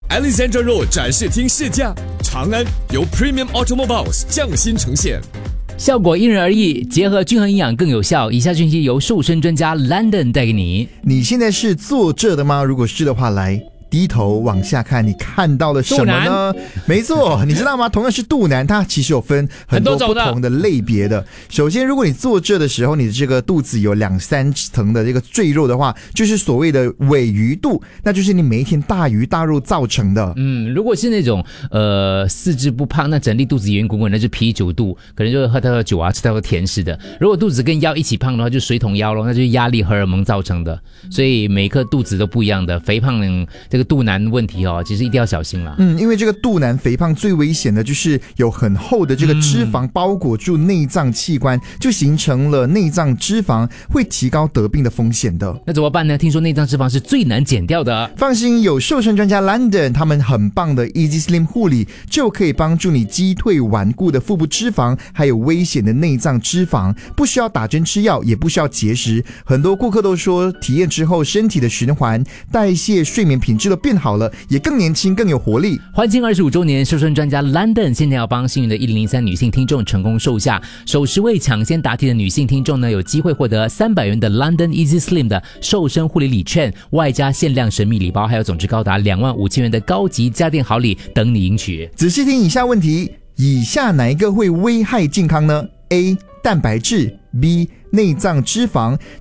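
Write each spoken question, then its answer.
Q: 以下哪一个会危害健康呢? A 蛋白质, B 内脏脂肪。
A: B: 内脏脂肪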